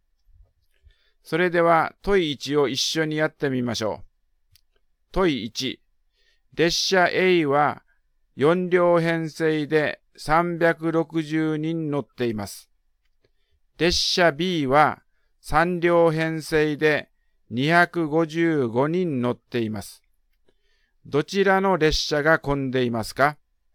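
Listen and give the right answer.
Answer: 列車A(1両あたり90人、列車Bは85人)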